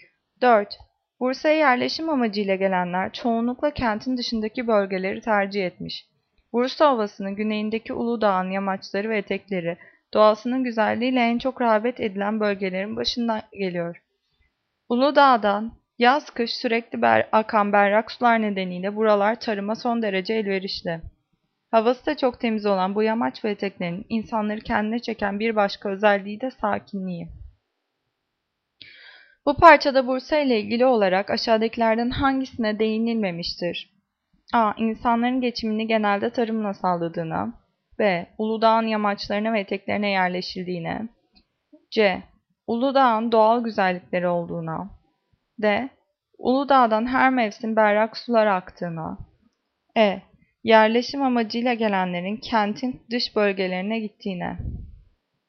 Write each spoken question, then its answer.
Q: Bu parçada Bursa ile ilgili olarak aşağıdakilerden hangisine değinilmemiştir?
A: Cevap A. İnsanların geçimini genelde tarımla sağladığına.